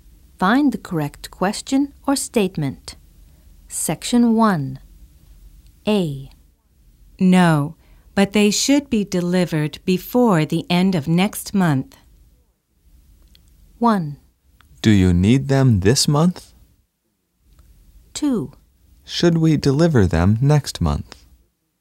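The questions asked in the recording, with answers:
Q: No, but they should be delivered before the end of next month.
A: 1: Do you need them this month?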